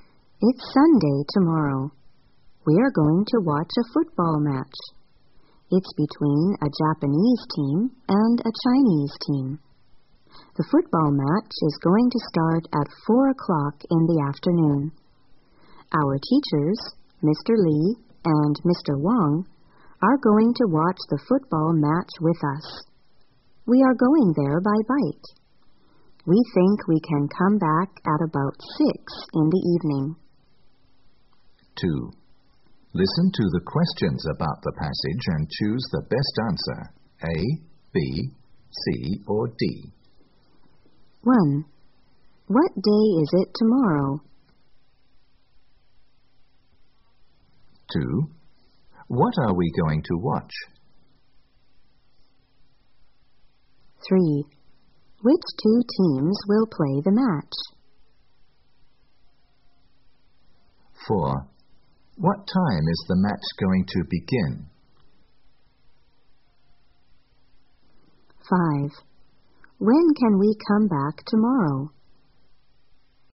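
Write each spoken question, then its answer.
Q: What day is it tomorrow?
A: Sunday

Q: What are we going to watch?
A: A football match

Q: Which two teams will play the match?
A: A Japanese team and a Chinese team

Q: What time is the match going to begin?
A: At 4 o'clock in the afternoon

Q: When can we come back tomorrow?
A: At about 6 in the evening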